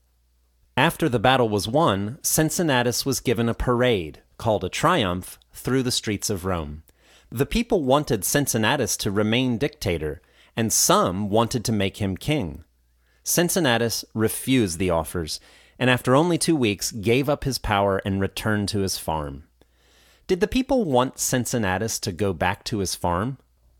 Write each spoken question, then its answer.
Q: Did the people want Cincinnatus to go back to his farm?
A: No, they certainly didn't.